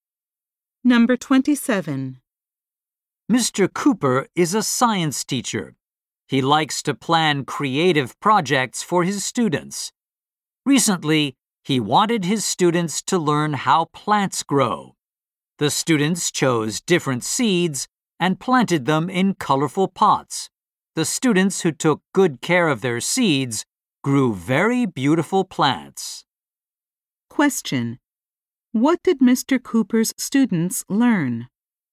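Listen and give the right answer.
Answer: How plants grow.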